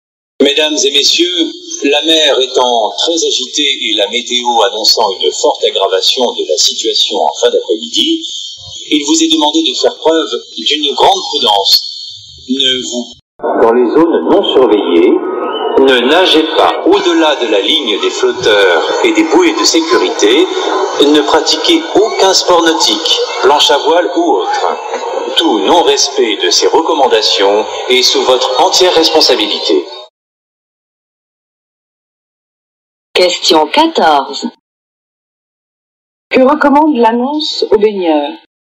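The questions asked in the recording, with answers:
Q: Que recommande l'annonce aux baigneurs ?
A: D'être très prudents : ne pas nager au-delà de la ligne des flotteurs et des bouées de sécurité, et ne pratiquer aucun sport nautique.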